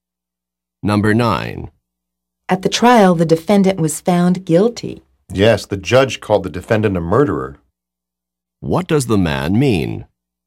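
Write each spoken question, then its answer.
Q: What does the man mean?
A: The judge called the defendant a murderer.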